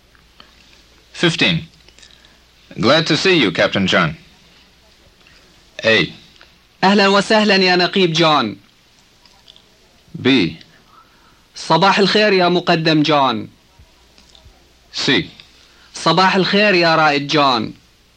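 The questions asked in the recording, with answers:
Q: Glad to see you, Captain John.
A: A: أهلا وسهلا يا نقيب جون.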